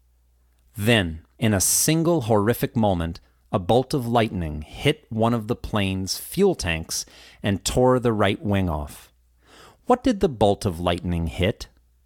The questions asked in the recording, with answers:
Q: What did the bolt of lightning hit?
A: It hit one of the plane's fuel tanks.